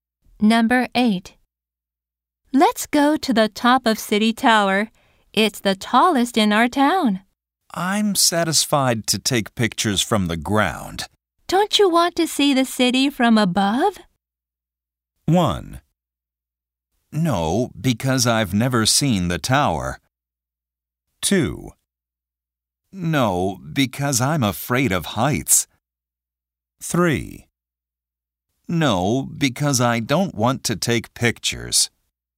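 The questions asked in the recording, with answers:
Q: Don't you want to see the city from above?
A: 2: No, because I'm afraid of heights.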